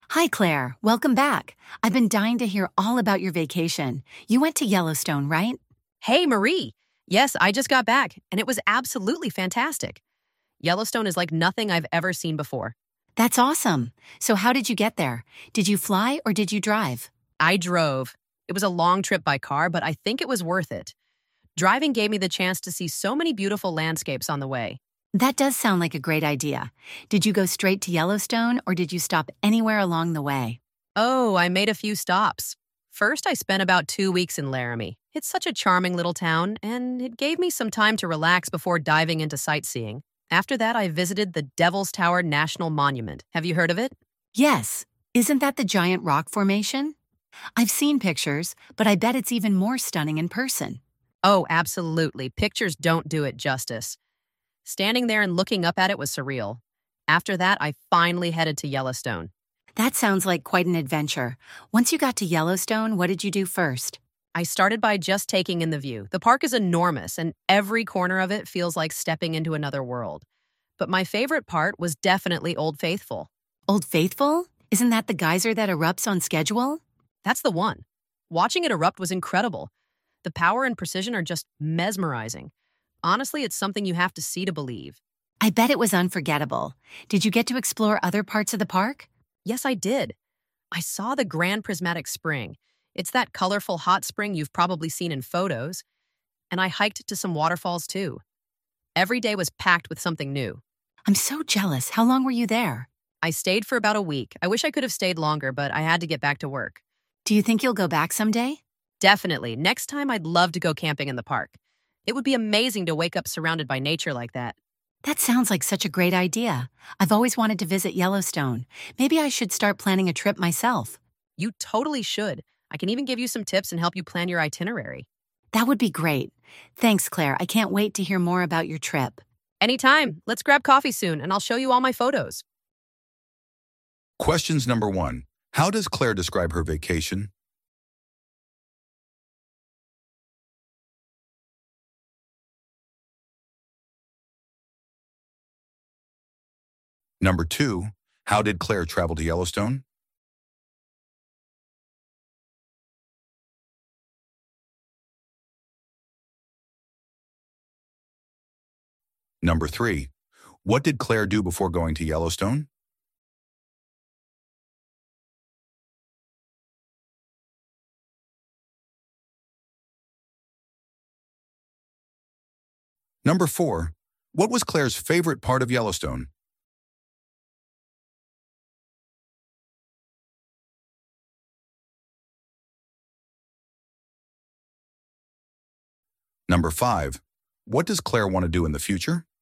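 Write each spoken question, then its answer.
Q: How does Claire describe her vacation?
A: Absolutely fantastic

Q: how did Claire travel to Yellowstone?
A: She drove

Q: what did Claire do before going to Yellowstone?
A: Spent about 2 weeks in Laramie and visited Devil's Tower

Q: what was Claire's favorite part of Yellowstone?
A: Old Faithful

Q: what does Claire want to do in the future?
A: Go camping in the park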